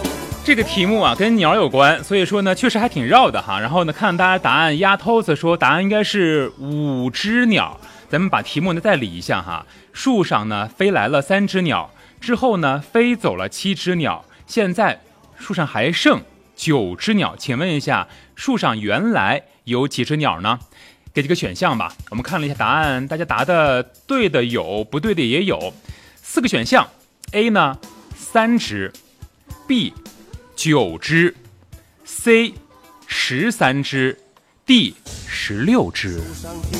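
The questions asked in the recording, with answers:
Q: 请问一下树上原来有几只鸟呢?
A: C: 十三只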